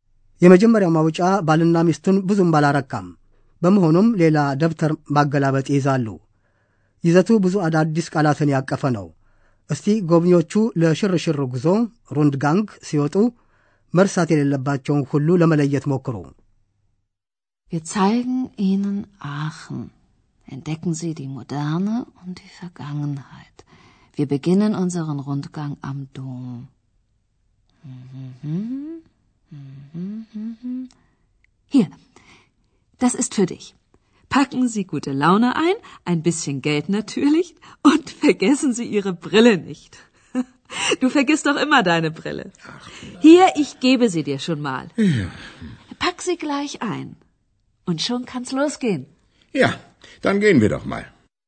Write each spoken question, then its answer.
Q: እስቲ ጎብኚዎቹ ለሽርሽር ጉዞ ሩንድ ጋንግ ሲወጡ መርሳት የሌለባቸውን ሁሉ ለመለየት ሞክሩ።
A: ጎብኚዎቹ ፌዝ በተሞላበት መንፈስ መነጽሮቻቸውን እንዳይረሱ ማሳሰቢያ ይቀርበላቸዋል።